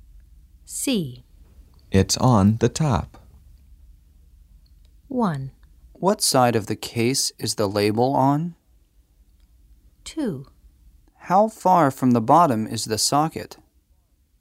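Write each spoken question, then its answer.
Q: It's on the top.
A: 1: What side of the case is the label on?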